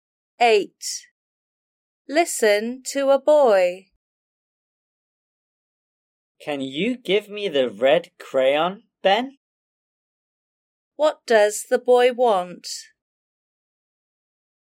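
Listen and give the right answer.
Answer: the red crayon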